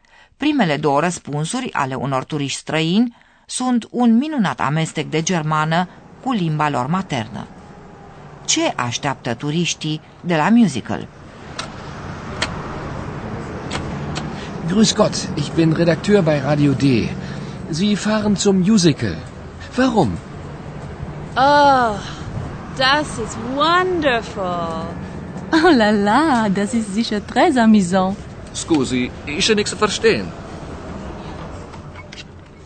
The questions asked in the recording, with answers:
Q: Ce așteaptă turiștii de la musical?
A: Turiștii se așteaptă să vadă un spectacol excelent.